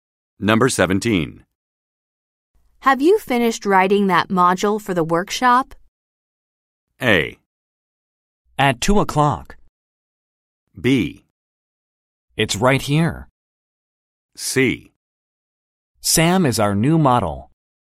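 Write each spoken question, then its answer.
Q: Have you finished writing that module for the workshop?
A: B: It's right here.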